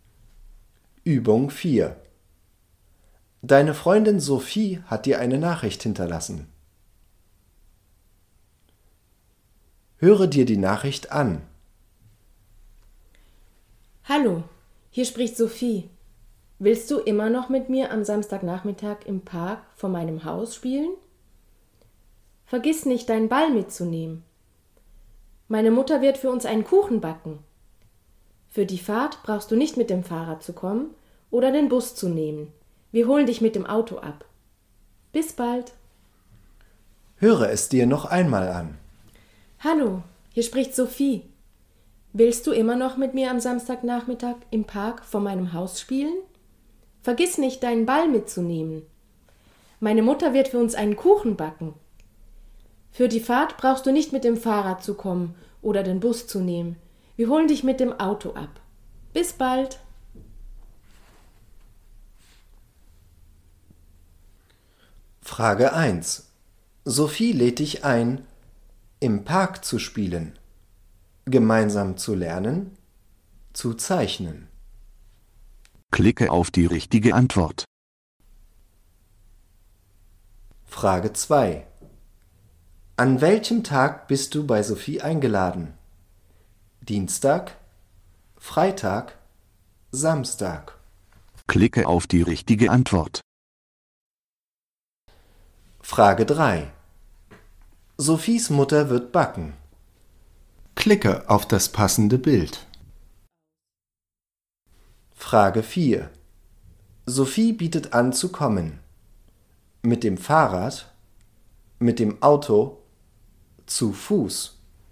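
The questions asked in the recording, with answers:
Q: Sophie lädt dich ein, im Park zu spielen, gemeinsam zu lernen, zu zeichnen.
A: im Park zu spielen

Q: An welchem Tag bist du bei Sophie eingeladen?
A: Samstag

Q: Sophies Mutter wird backen.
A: einen Kuchen

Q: Sophie bietet an zu kommen.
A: mit dem Auto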